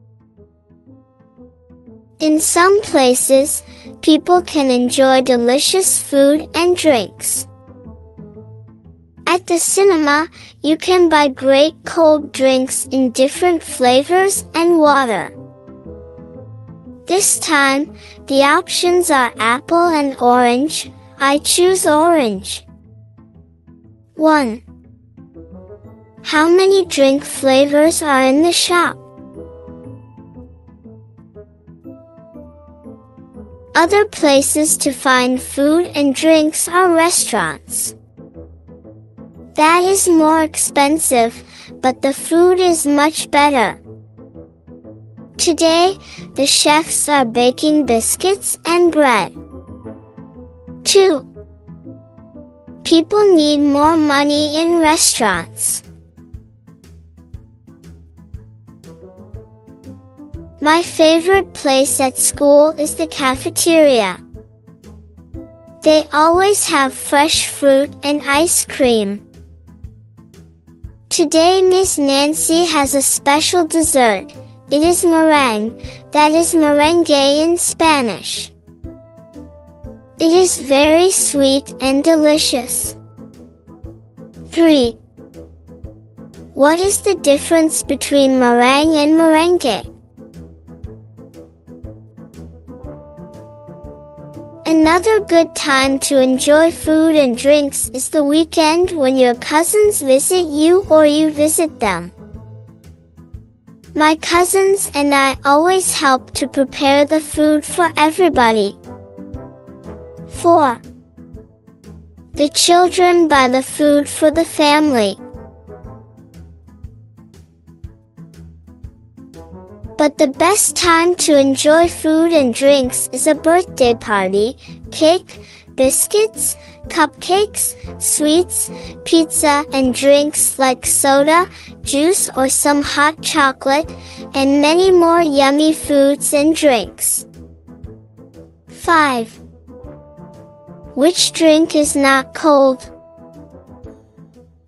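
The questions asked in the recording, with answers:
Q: How many drink flavors are in the shop?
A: Two (apple and orange)

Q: People need more money in restaurants.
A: True

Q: What is the difference between meringue and merengue?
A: They are the same thing; merengue is the Spanish word

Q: The children buy the food for the family.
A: False (they help to prepare the food)

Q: Which drink is not cold?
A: Hot chocolate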